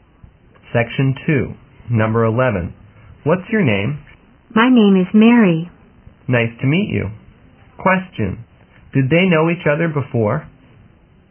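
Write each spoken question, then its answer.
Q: Did they know each other before?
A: No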